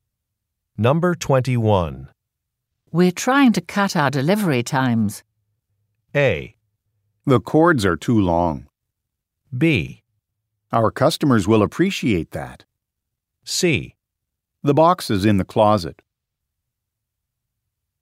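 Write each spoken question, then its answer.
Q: We're trying to cut our delivery times.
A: B: Our customers will appreciate that.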